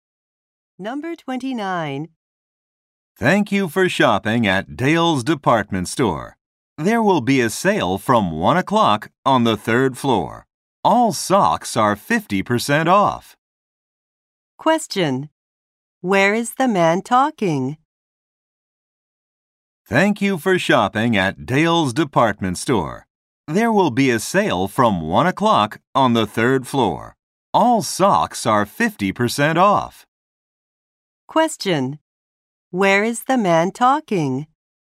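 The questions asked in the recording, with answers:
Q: Where is the man talking?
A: At a department store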